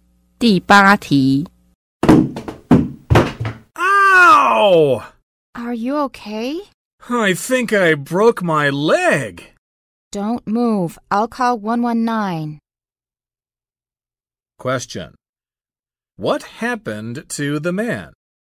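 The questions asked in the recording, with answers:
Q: What happened to the man?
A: He broke his leg.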